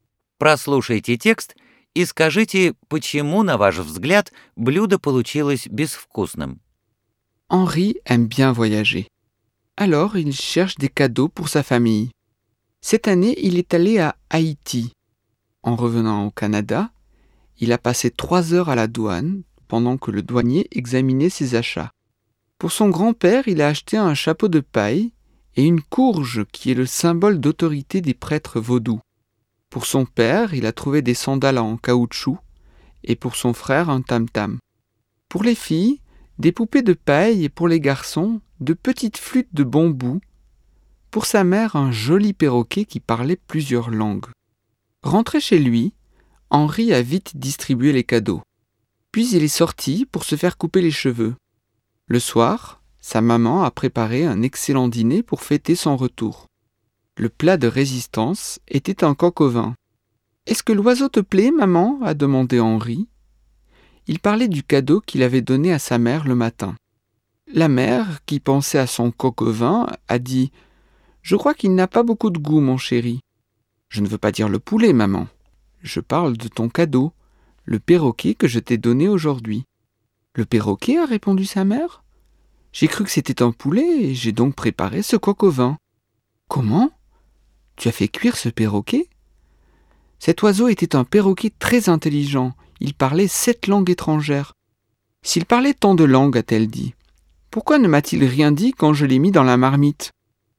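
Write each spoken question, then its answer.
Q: Прослушайте текст и скажите, почему, на ваш взгляд, блюдо получилось безвкусным.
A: Потому что мама приготовила не курицу, а попугая, которого Анри ей подарил: она приняла его за курицу.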